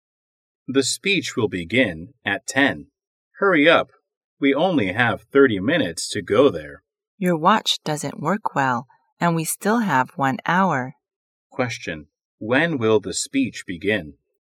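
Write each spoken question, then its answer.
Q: When will the speech begin?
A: At 10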